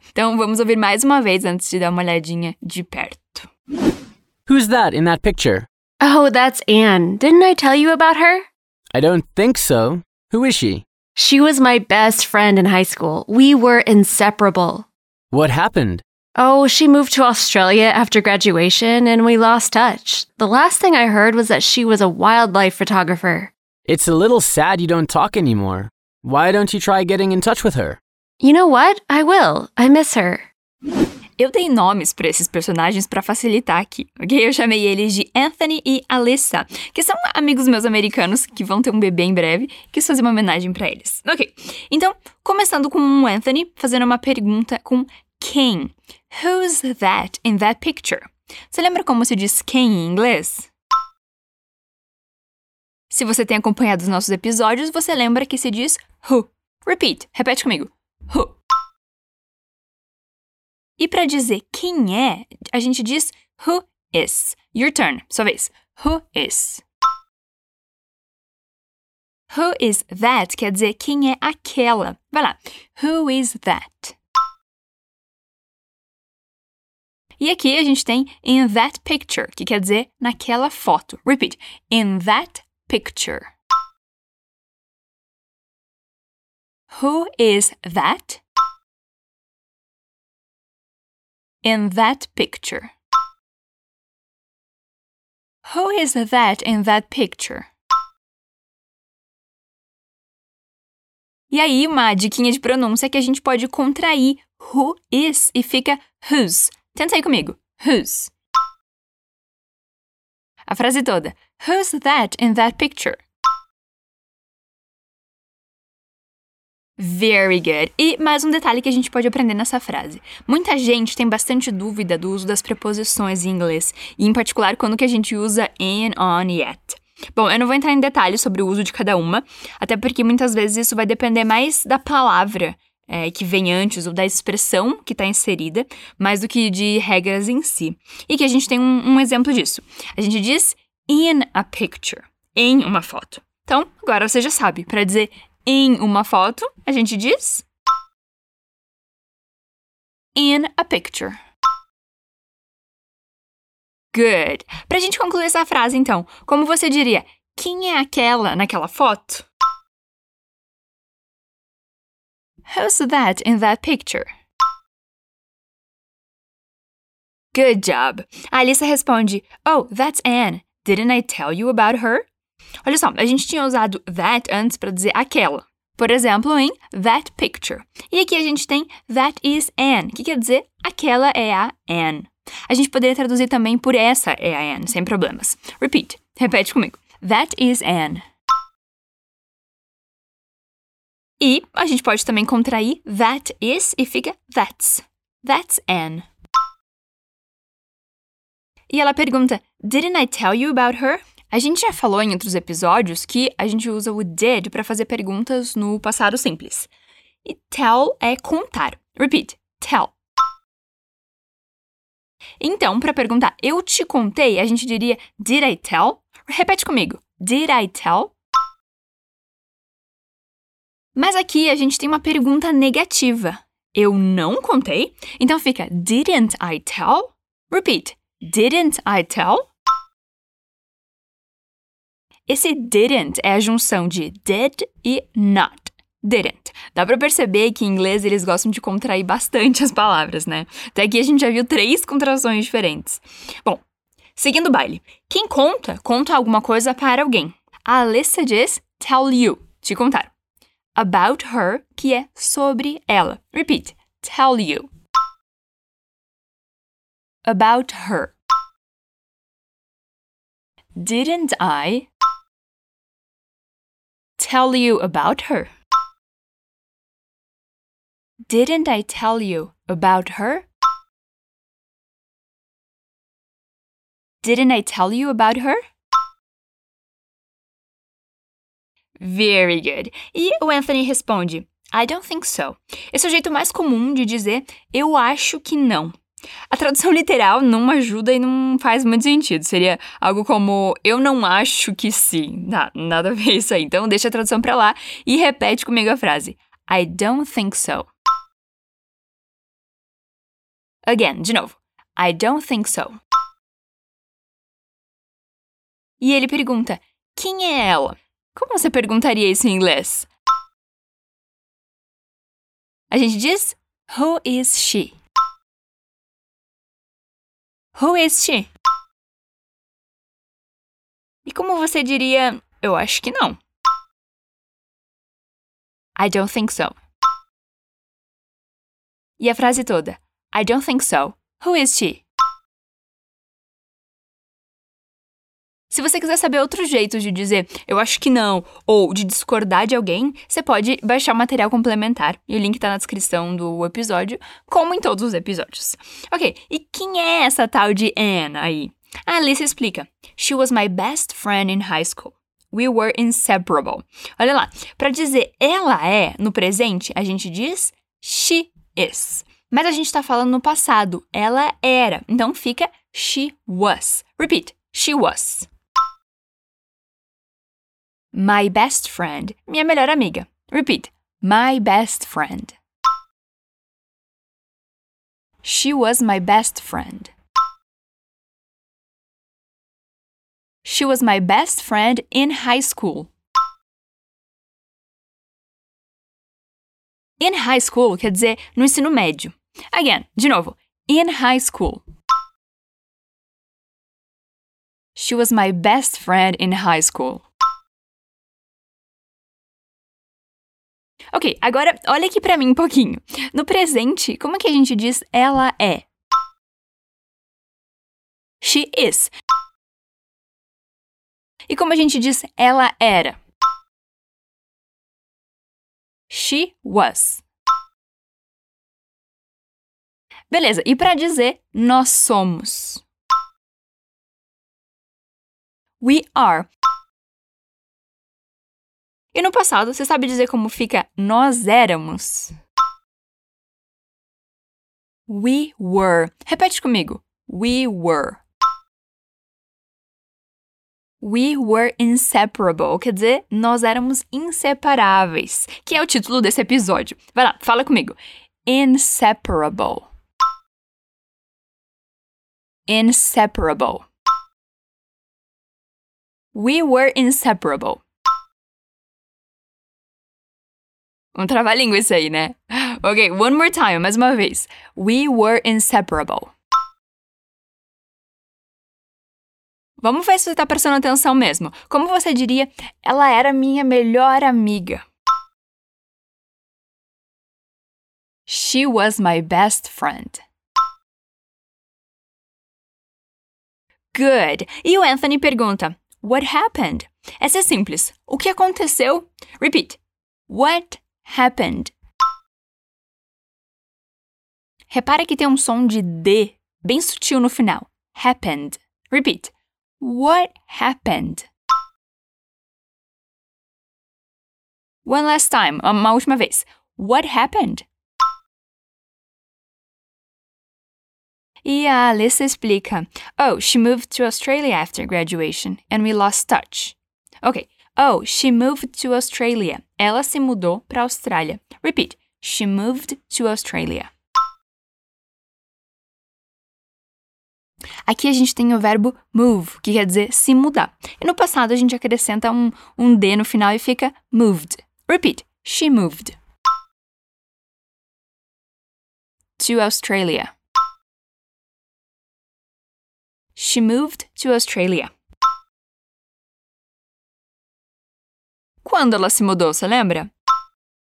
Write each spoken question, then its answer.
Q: Quando ela se mudou, você lembra?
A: After graduation, que quer dizer depois da formatura.